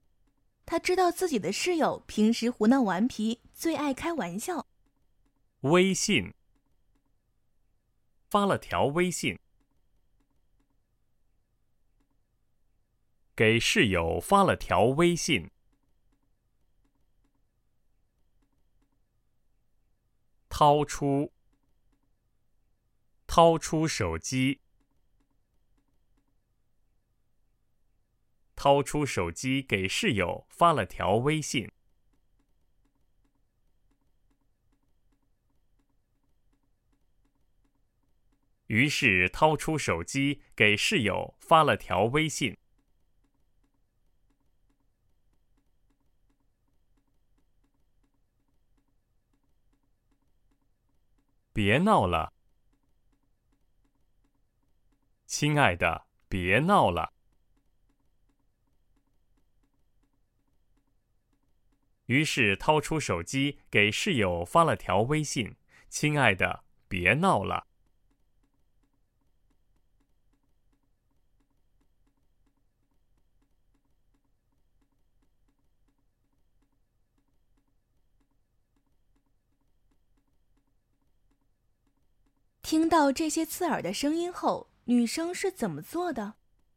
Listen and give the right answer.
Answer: 于是掏出手机给室友发了条微信,亲爱的,别闹了。